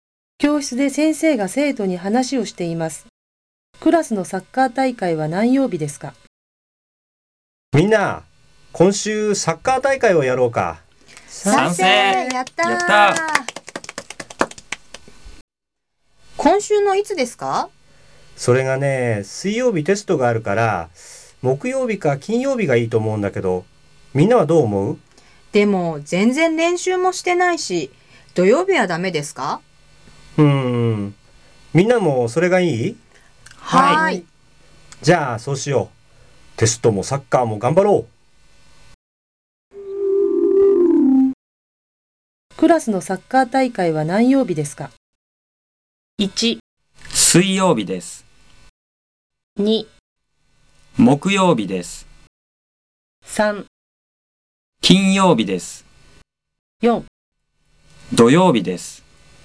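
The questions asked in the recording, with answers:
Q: クラスのサッカー大会は何曜日ですか?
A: 4: 土曜日です。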